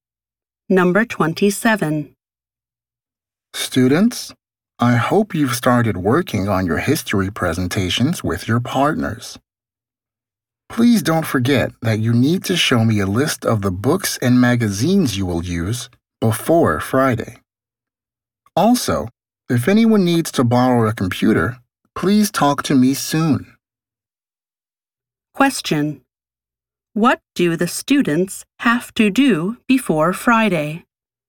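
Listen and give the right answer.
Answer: Show the teacher a list of the books and magazines they will use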